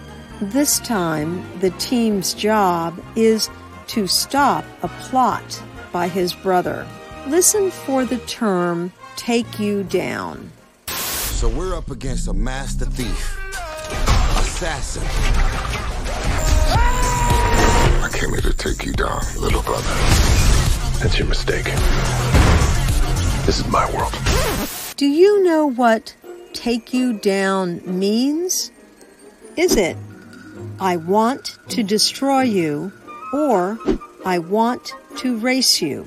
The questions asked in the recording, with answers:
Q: Do you know what take you down means? Is it, I want to destroy you, or I want to race you?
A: Take you down means I want to destroy you.